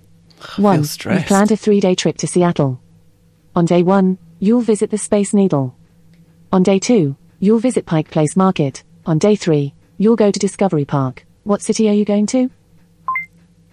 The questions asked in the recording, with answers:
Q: What city are you going to?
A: The answer was Seattle.